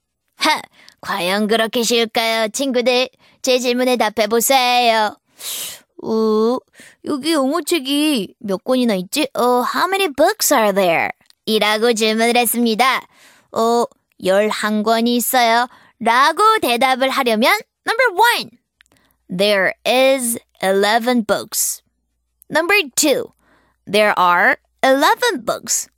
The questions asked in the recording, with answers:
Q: 여기 영어책이 몇 권이나 있지? How many books are there?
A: 그래서 정답은 바로 2번입니다. There are 11 books.